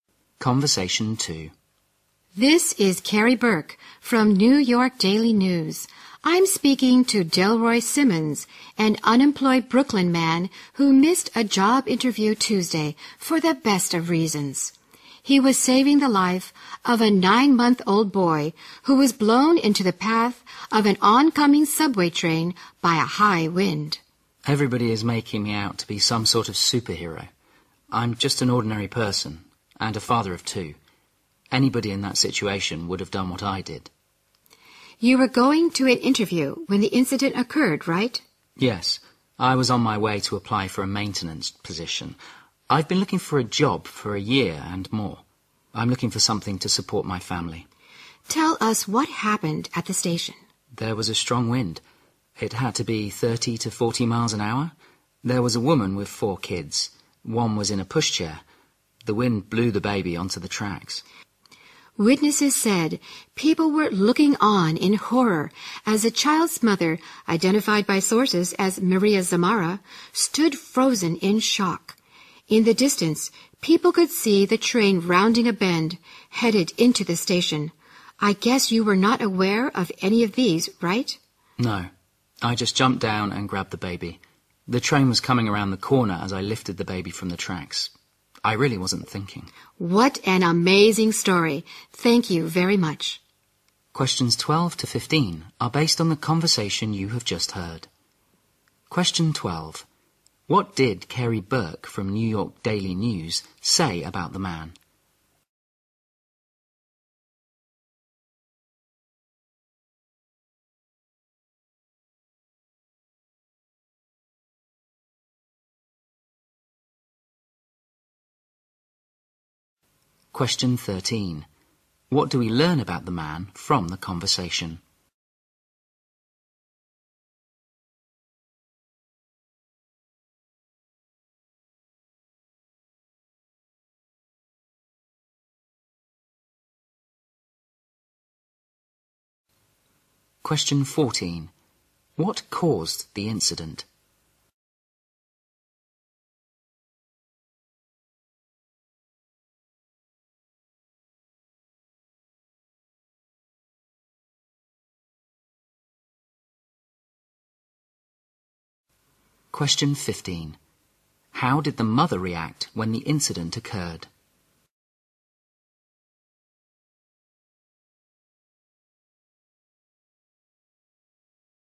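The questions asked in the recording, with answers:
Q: What did Carrie Burke from New York Daily News say about the man?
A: He missed a job interview to save a baby's life

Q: What do we learn about the man from the conversation?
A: He is unemployed and has been looking for a job for over a year

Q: What caused the incident?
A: A strong wind blew the baby onto the tracks

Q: How did the mother react when the incident occurred?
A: She stood frozen in shock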